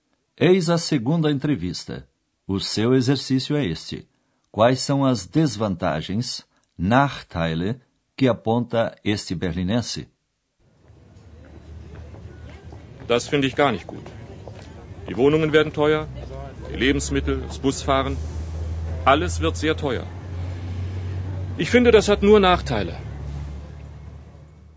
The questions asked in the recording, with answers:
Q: Quais são as desvantagens, Nachteile, que aponta este berlinense.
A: Na opinião desse cidadão, o fato traz a seguinte desvantagem: tudo ficará mais caro.